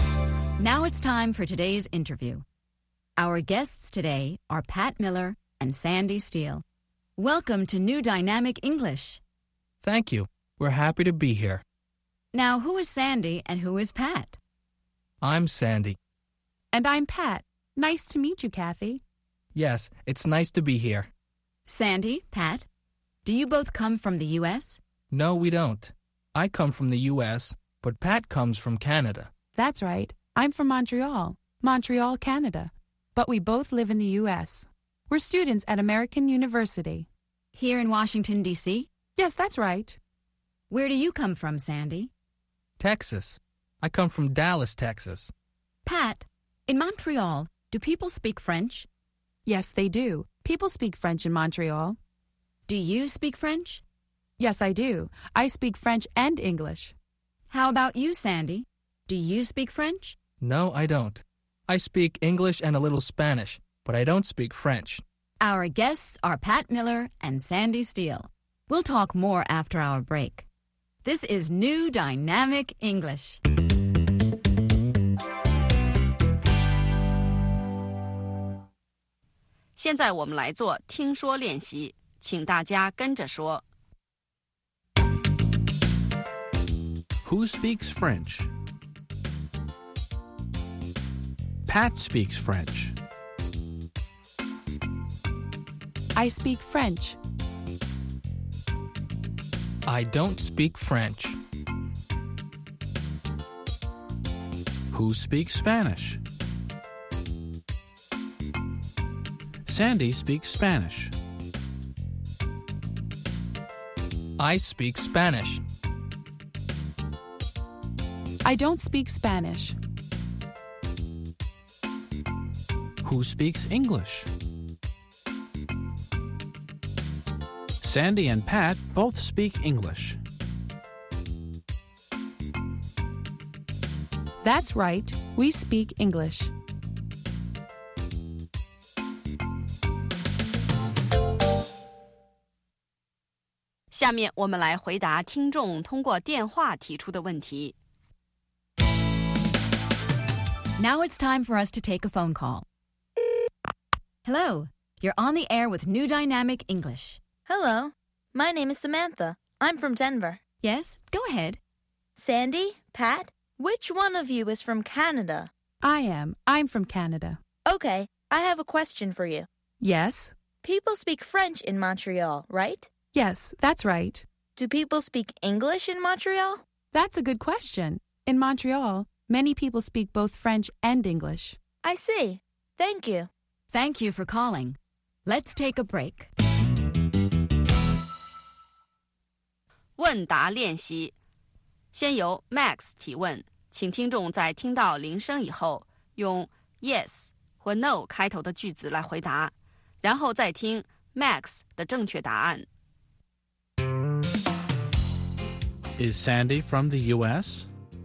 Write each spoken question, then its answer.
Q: Is Sandy from the U.S.?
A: Yes, he is. He's from the U.S.